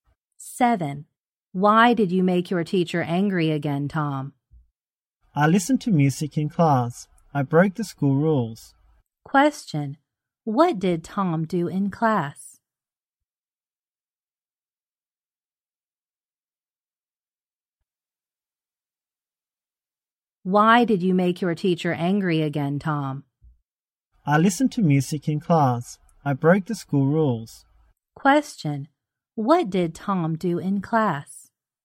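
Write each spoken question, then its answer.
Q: Question, what did Tom do in class?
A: He listened to music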